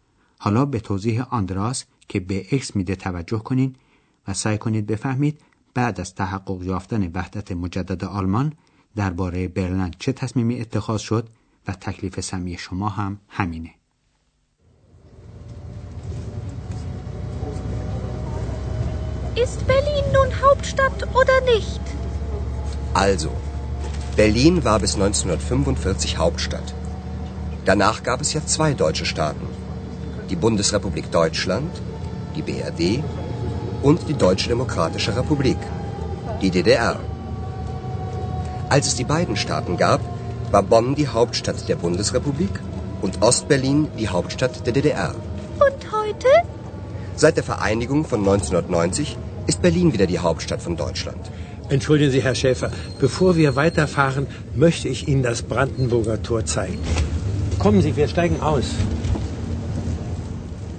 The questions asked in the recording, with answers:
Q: سعی کنید بفهمید بعد از تحقق یافتن وحدت مجدد آلمان درباره برلن چه تصمیمی اتخاذ شد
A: پس فهمیدیم که پس از وحدت مجدد آلمان که در سال 1990 صورت گرفت برلند دوباره پایتخت آلمان واحد شد